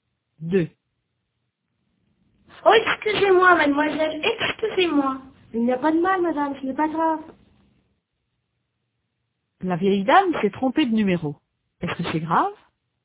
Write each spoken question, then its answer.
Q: Est-ce que c'est grave?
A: Non, ce n'est pas grave. Il n'y a pas de mal.